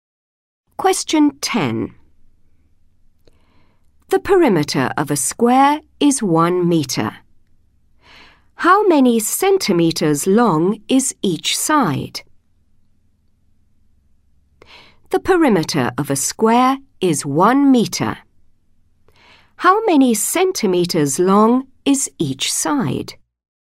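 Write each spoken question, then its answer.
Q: How many centimeters long is each side?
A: 25 centimetres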